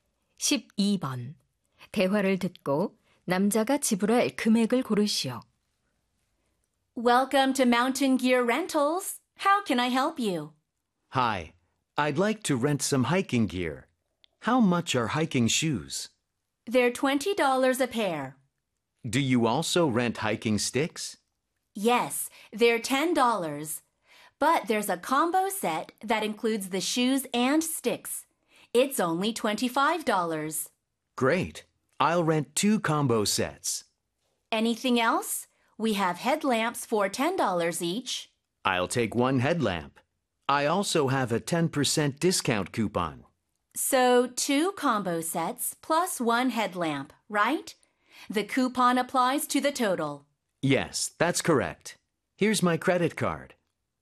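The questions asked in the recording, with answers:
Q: 대화를 듣고 남자가 지불할 금액을 고르시오.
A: 54달러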